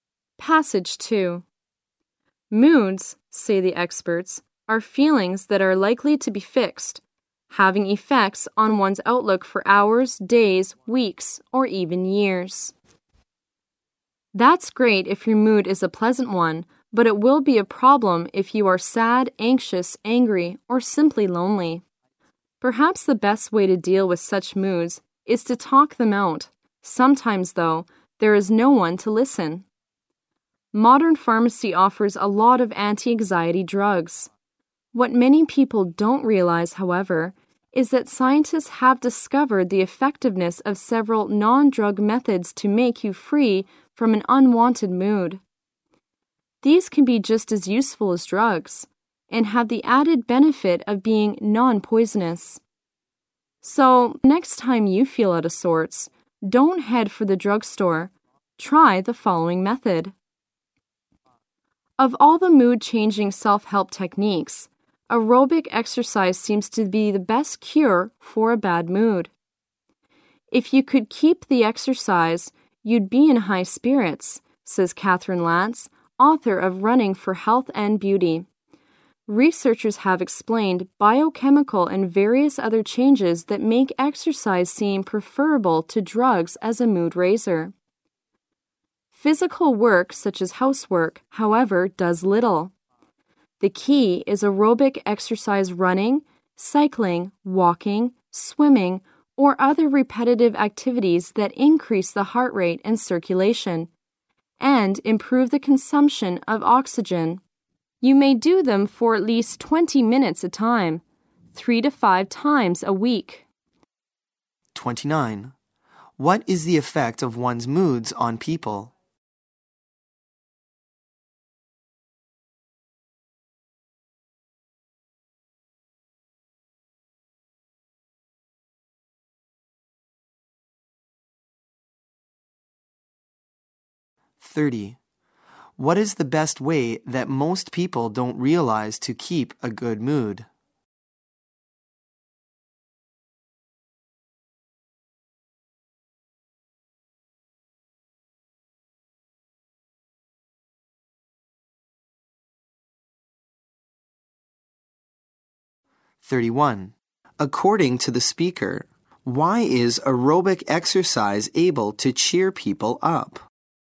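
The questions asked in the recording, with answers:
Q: What is the effect of one's moods on people?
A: They affect a person's outlook for hours, days, weeks or even years.

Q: What is the best way that most people don't realize to keep a good mood?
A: Non-drug methods, especially aerobic exercise.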